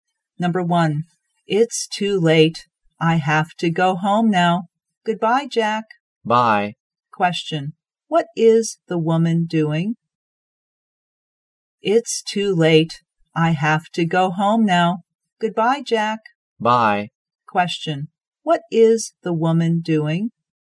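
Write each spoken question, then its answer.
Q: what is the woman doing?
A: Saying goodbye / leaving to go home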